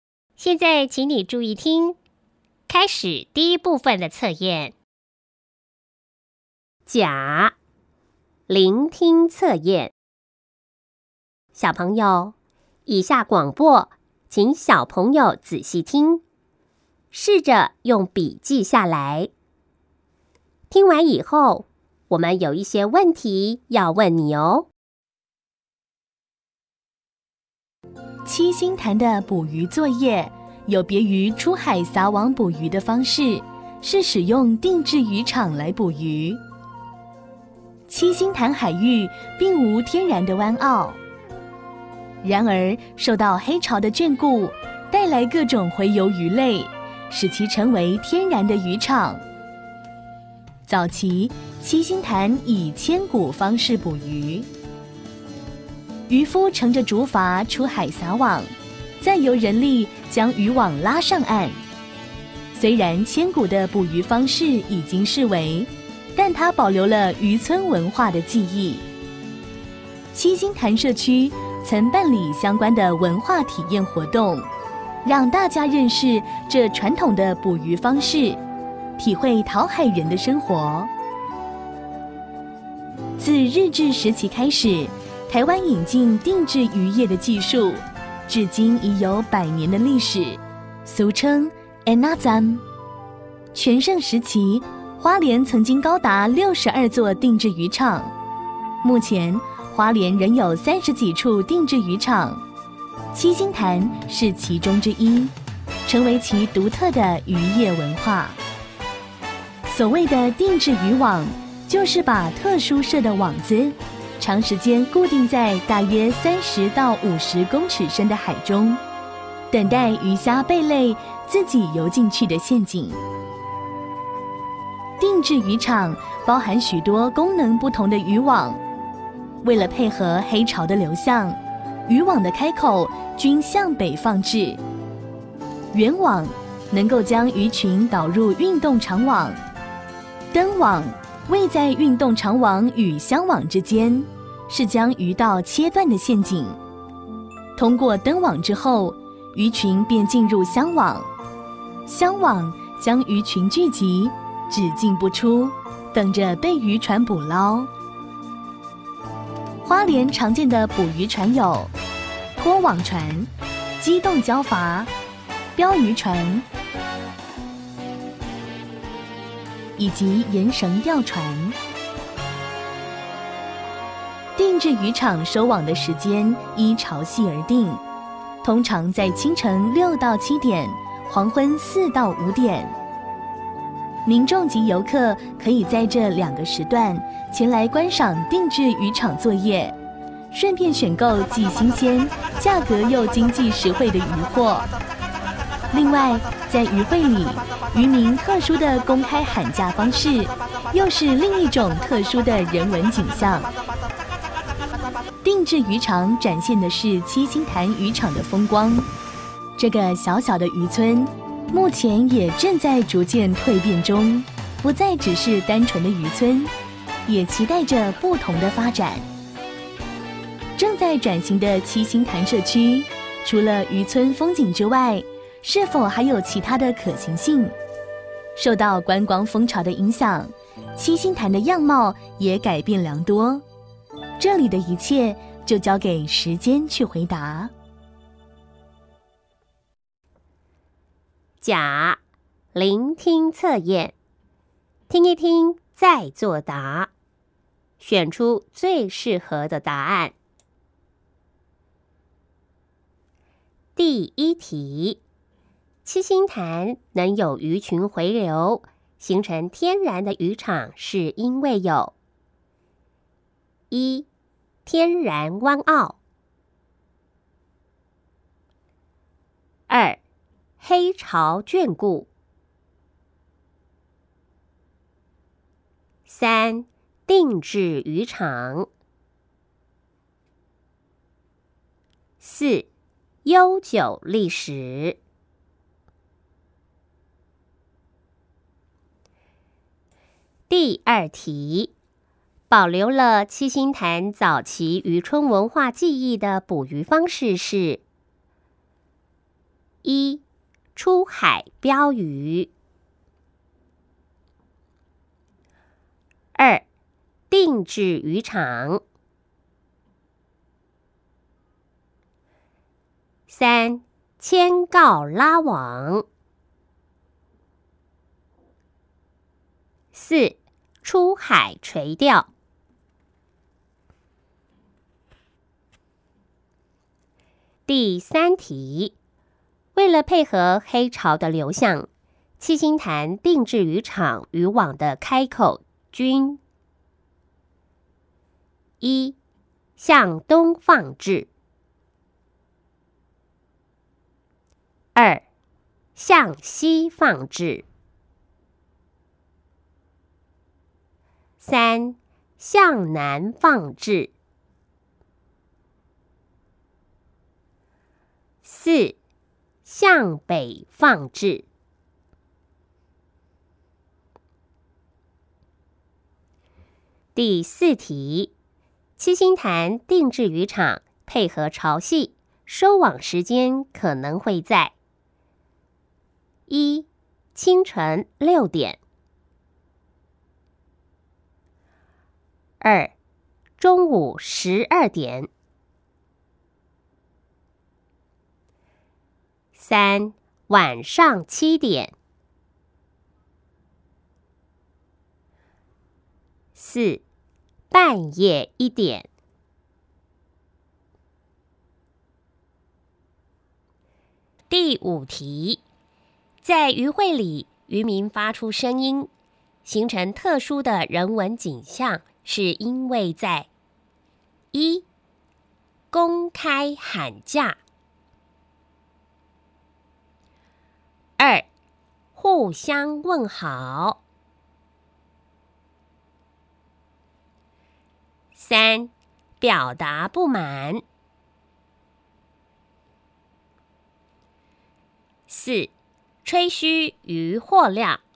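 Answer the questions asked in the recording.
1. 二: 黑潮眷顾
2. 三: 牵告拉网
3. 四: 向北放置
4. 一: 清晨六点
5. 一: 公开喊价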